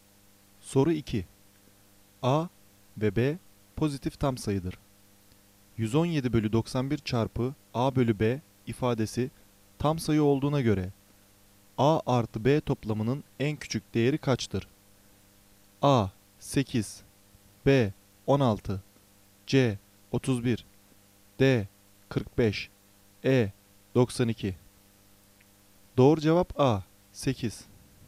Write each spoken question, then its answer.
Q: 117 bölü 91 çarpı A bölü B ifadesi tam sayı olduğuna göre A artı B toplamının en küçük değeri kaçtır?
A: Doğru cevap A 8